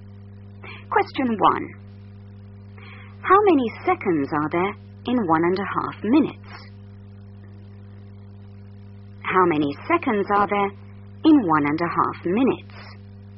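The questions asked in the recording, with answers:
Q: How many seconds are there in 1.5 minutes?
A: 90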